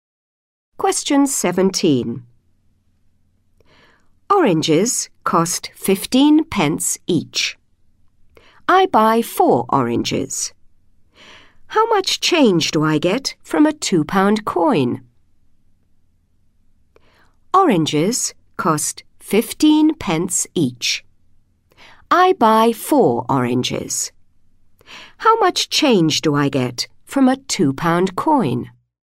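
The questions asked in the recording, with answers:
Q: I buy 4 oranges. How much change do I get from a £2 coin?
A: £1.40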